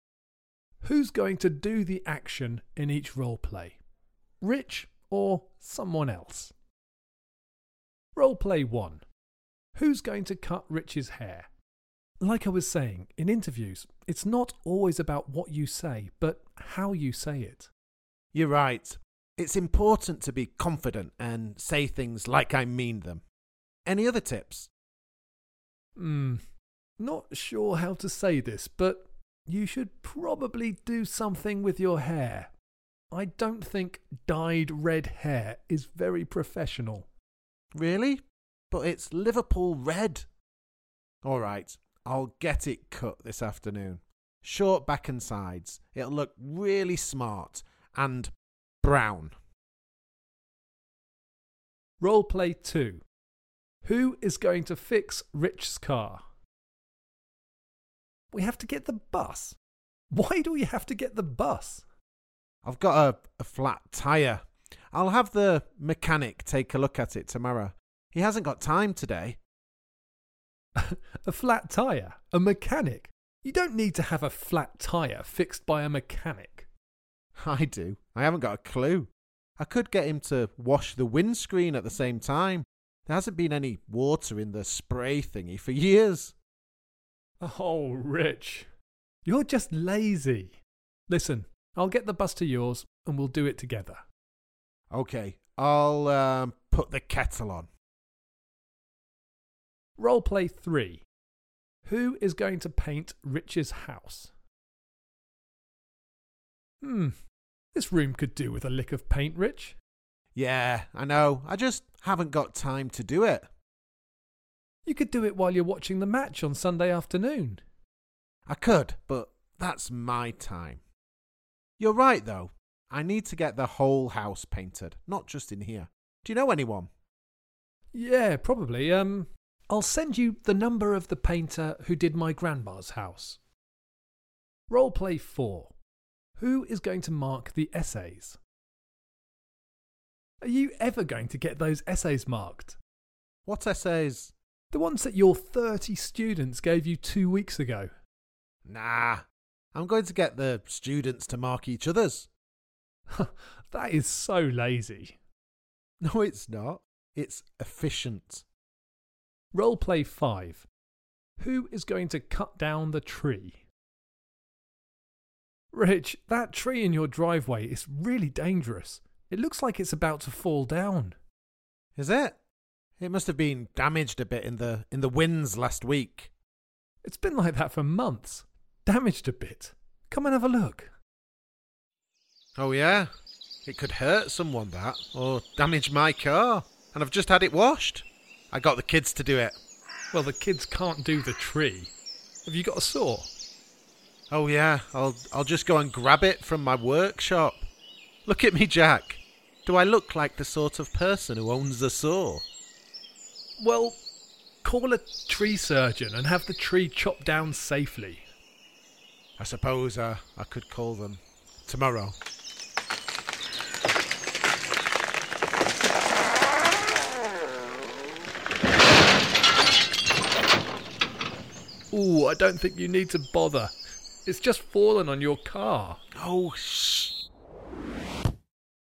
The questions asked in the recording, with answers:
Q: Who's going to cut Rich's hair?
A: The hairdresser.

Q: Who is going to fix Rich's car?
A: I wanted the mechanic to do it, but you said we'd do it together, so probably just you.

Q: Who is going to paint Rich's house?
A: You've got a contact for me.

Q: Who is going to mark the essays?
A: That would be my students.

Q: Who is going to cut down the tree?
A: Well, it came down on its own, didn't it?